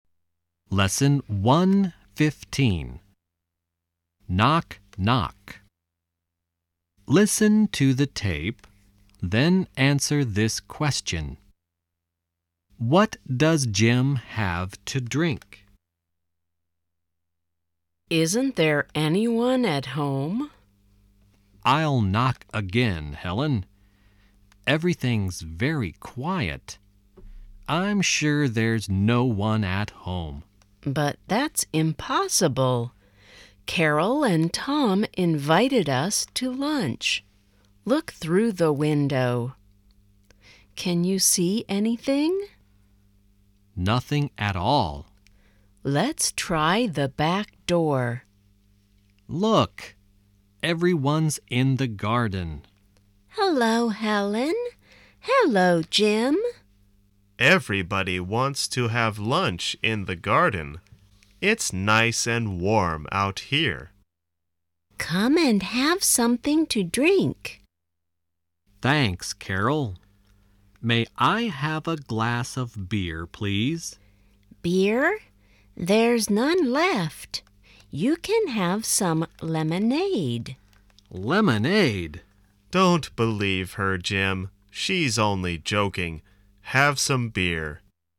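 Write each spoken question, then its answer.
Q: What does Jim have to drink?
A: Beer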